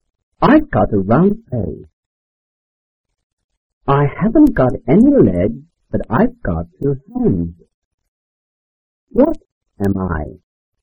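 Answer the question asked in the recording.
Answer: a clock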